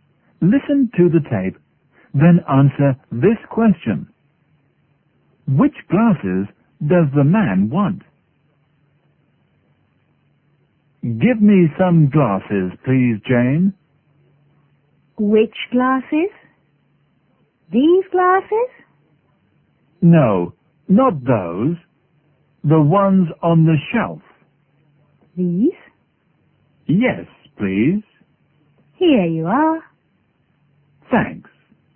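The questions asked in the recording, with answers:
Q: Which glasses does the man want?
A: The ones on the shelf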